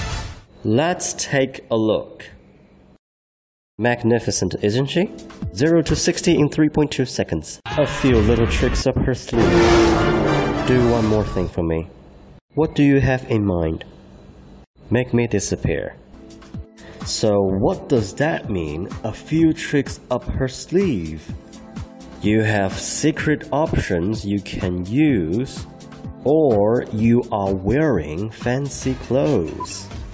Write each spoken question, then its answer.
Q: So what does that mean, a few tricks up her sleeve?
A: A few tricks up her sleeve means you have secret options you can use.